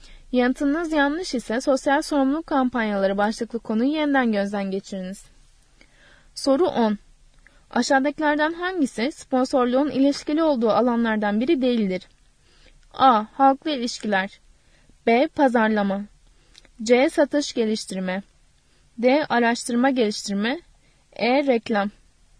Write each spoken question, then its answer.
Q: Aşağıdakilerden hangisi sponsorluğun ilişkili olduğu alanlardan biri değildir?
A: Doğru yanıt D şıkkı. Araştırma geliştirme.